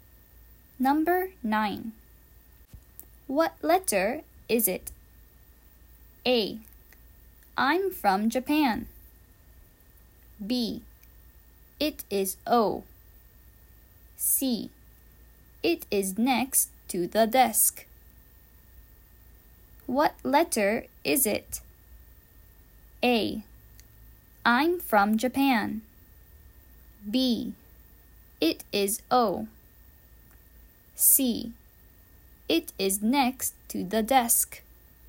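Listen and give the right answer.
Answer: B: It is O.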